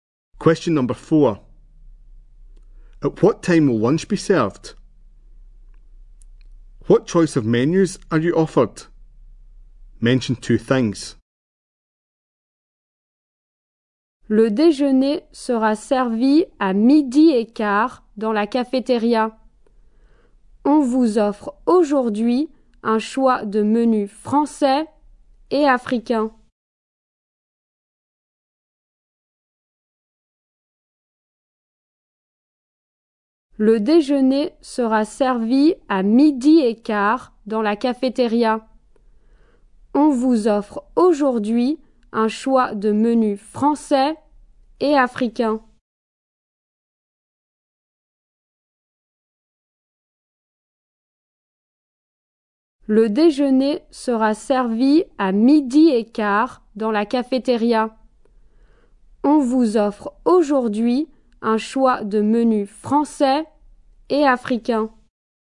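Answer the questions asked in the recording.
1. At quarter past twelve
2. French and African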